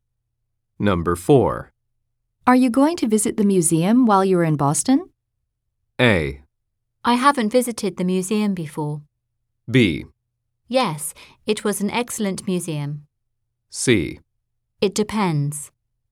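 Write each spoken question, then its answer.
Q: Are you going to visit the museum while you're in Boston?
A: C: It depends.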